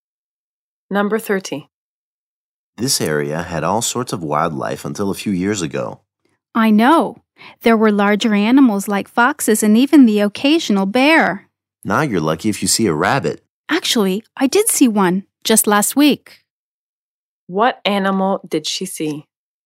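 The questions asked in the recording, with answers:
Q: What animal did she see?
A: A rabbit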